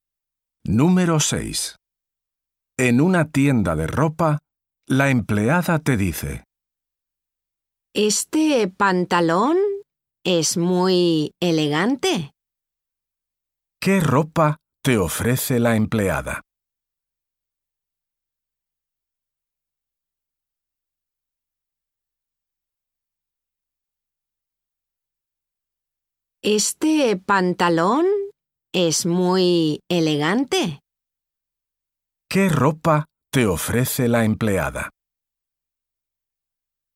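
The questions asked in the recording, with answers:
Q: ¿Qué ropa te ofrece la empleada?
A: Un pantalón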